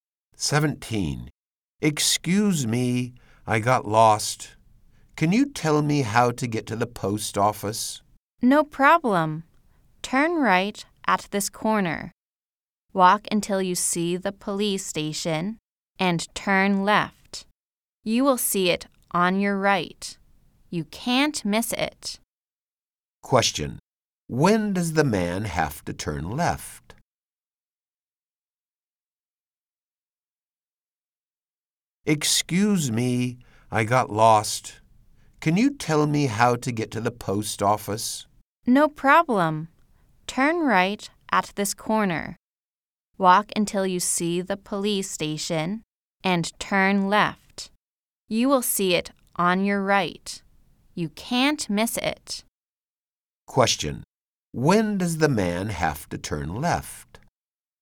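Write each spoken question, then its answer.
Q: Question. When does the man have to turn left?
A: When he sees the police station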